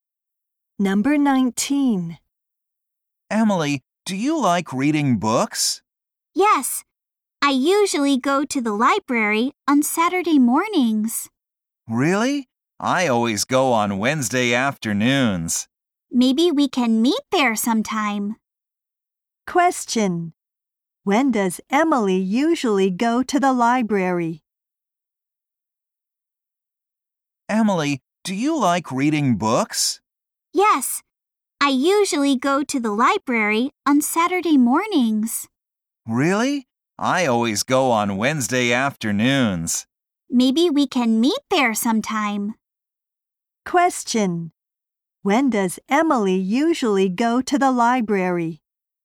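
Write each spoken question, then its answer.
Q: When does Emily usually go to the library?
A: On Saturday mornings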